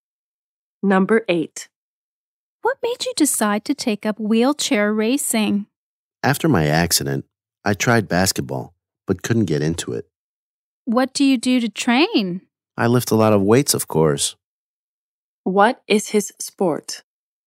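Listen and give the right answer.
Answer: Wheelchair racing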